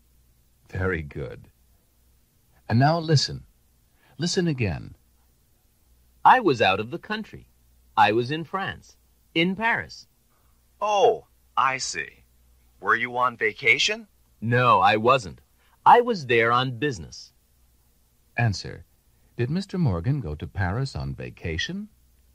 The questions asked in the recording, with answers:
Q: Did Mr. Morgan go to Paris on vacation?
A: No, he didn't.